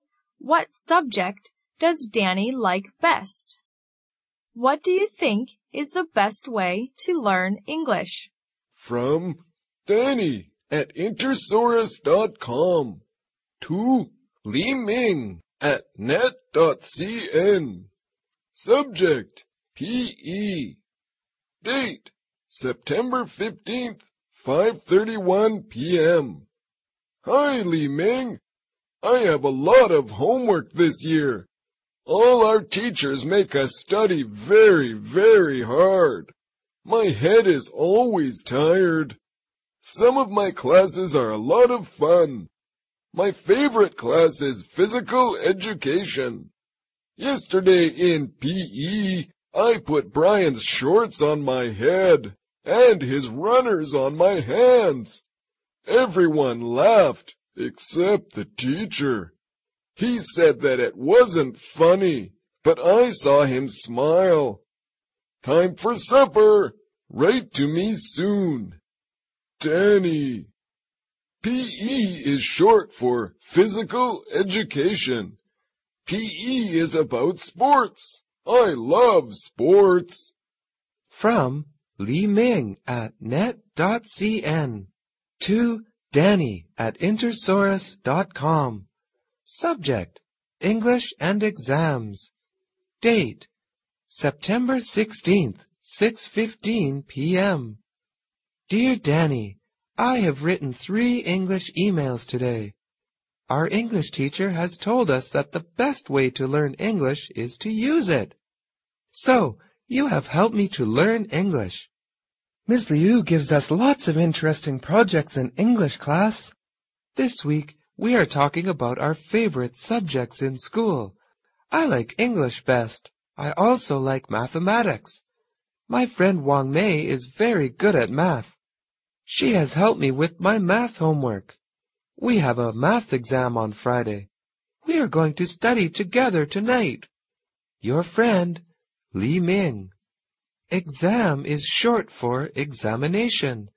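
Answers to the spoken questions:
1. P.E. (physical education)
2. To use it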